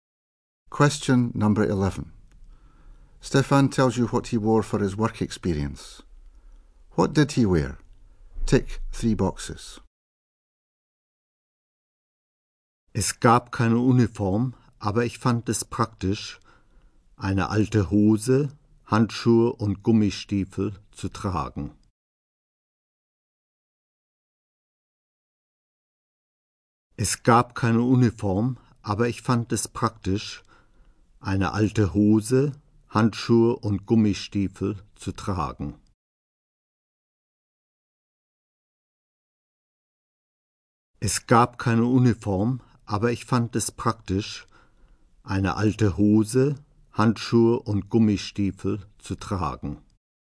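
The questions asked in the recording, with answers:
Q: What did he wear?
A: Old trousers, gloves and wellington boots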